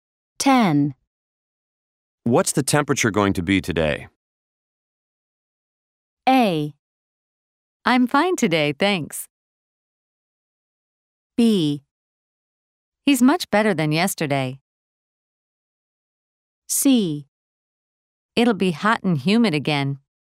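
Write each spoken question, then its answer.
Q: What's the temperature going to be today?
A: C: It'll be hot and humid again.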